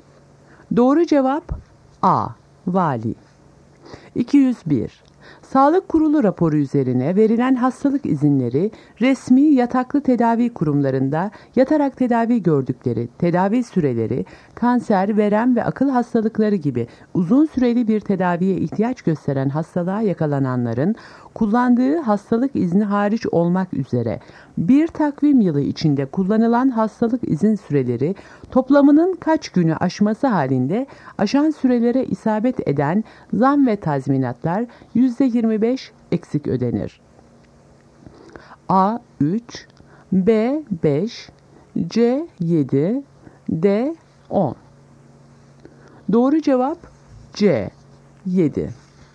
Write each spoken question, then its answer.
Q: Sağlık Kurulu raporu üzerine verilen hastalık izinleri resmi yataklı tedavi kurumlarında yatarak tedavi gördükleri, tedavi süreleri, kanser, verem ve akıl hastalıkları gibi uzun süreli bir tedaviye ihtiyaç gösteren hastalığa yakalananların kullandığı hastalık izni hariç olmak üzere bir takvim yılı içinde kullanılan hastalık izin süreleri toplamının kaç günü aşması halinde aşan sürelere isabet eden zam ve tazminatlar %25 eksik ödenir.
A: Doğru cevap C 7.